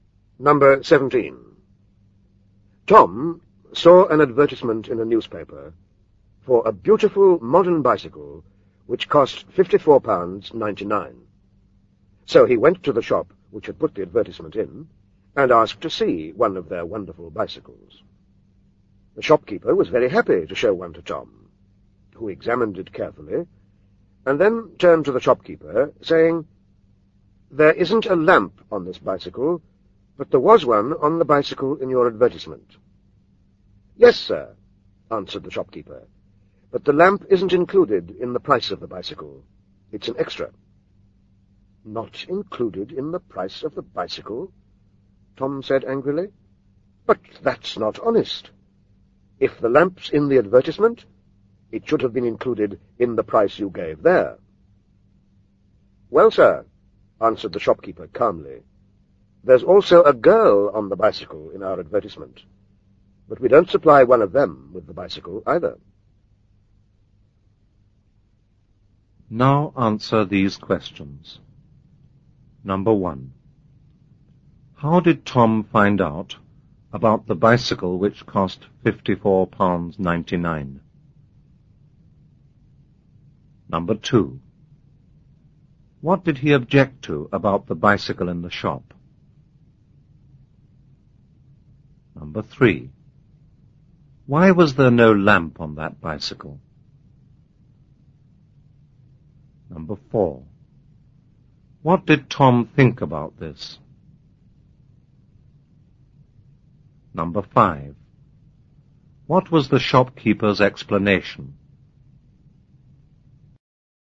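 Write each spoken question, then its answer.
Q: How did Tom find out about the bicycle which cost £54.99?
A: He saw an advertisement in a newspaper

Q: What did he object to about the bicycle in the shop?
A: It had no lamp, though the one in the advertisement did

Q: Why was there no lamp on that bicycle?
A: The lamp was an extra, not included in the price

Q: What did Tom think about this?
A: He thought it was not honest

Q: What was the shopkeeper's explanation?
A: There was also a girl on the bicycle in the advertisement, but they didn't supply one with the bicycle either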